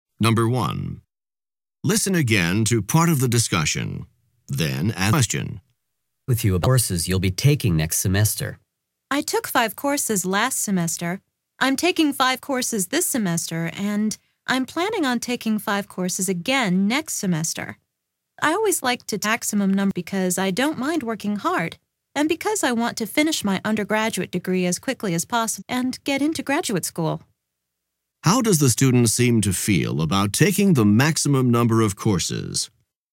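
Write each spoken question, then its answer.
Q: How does the student seem to feel about taking the maximum number of courses?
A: He's happy to do it: he doesn't mind working hard and wants to finish his degree quickly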